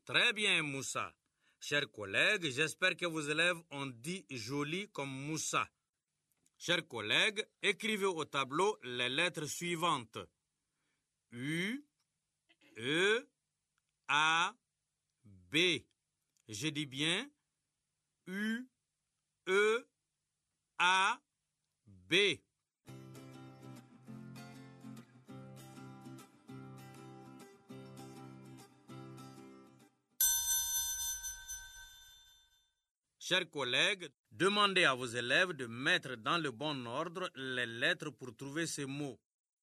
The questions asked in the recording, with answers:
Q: Chers collègues, demandez à vos élèves de mettre dans le bon ordre les lettres pour trouver ces mots.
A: Monsieur, c'est beau.